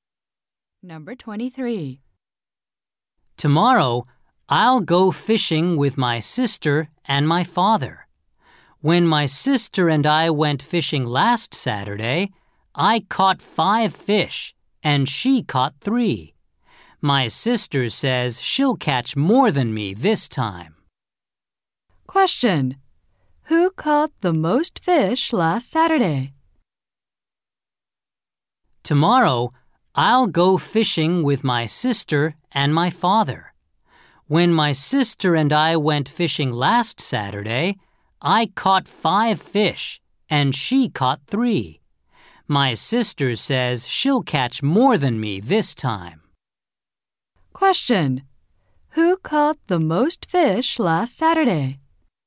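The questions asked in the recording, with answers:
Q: Who caught the most fish last Saturday?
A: The speaker.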